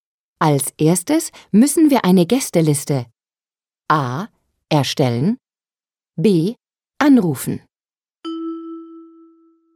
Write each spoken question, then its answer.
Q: Als erstes müssen wir eine Gästeliste A.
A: A. Als erstes müssen wir eine Gästeliste erstellen.